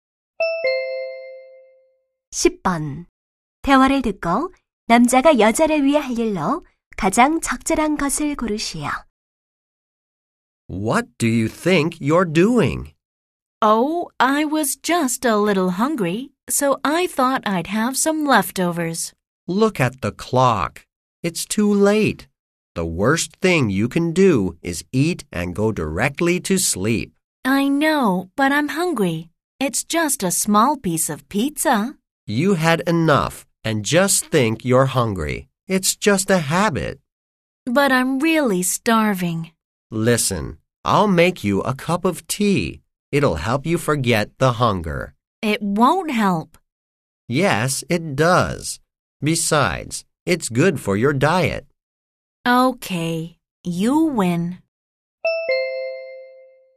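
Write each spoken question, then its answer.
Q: 대화를 듣고 남자가 여자를 위해 할 일로 가장 적절한 것을 고르시오.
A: 차 한 잔 만들어 주기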